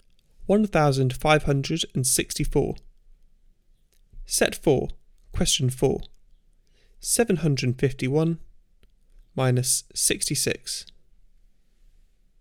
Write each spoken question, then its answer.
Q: 751 minus 66.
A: Answer 685.